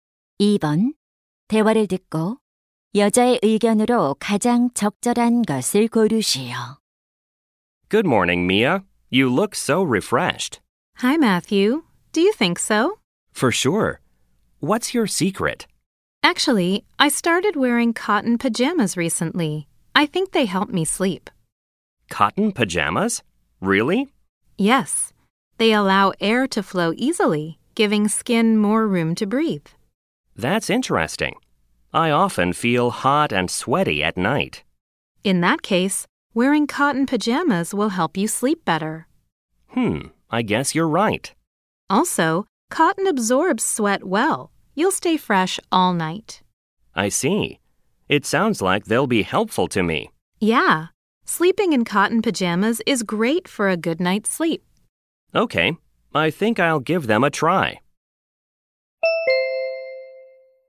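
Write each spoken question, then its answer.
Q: 대화를 듣고 여자의 의견으로 가장 적절한 것을 고르시오.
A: 면 잠옷을 입고 자면 숙면에 도움이 된다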